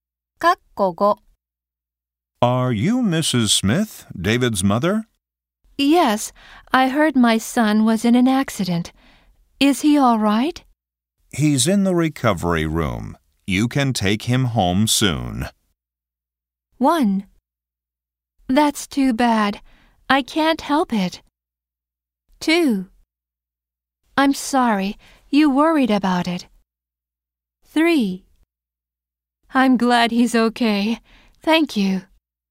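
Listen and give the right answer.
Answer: 3: I'm glad he's okay. Thank you.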